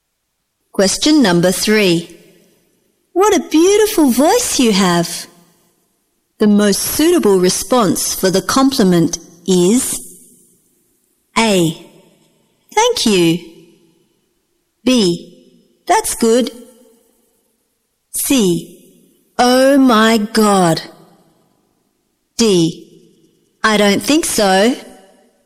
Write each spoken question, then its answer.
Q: What a beautiful voice you have. The most suitable response for the compliment is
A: A. Thank you.